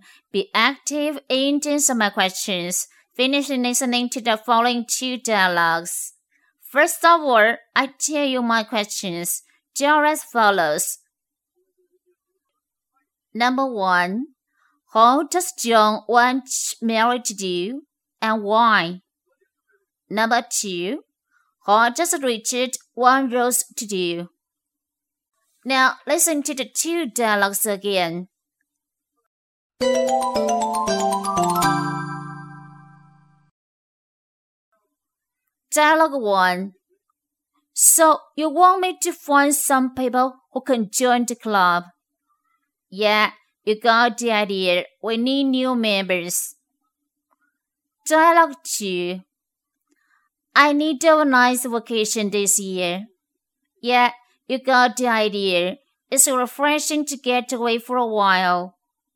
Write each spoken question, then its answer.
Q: how does John want Mary to do and why?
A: John asks Mary to find some friends to join the club because it needs new members.